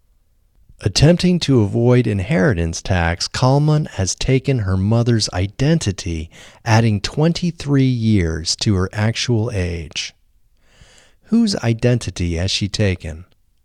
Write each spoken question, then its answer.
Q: Whose identity has she taken?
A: She has taken her mother's identity.